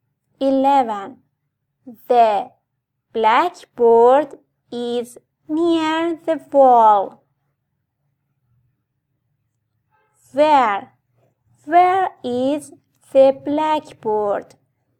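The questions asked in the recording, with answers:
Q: Where is the blackboard?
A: near the wall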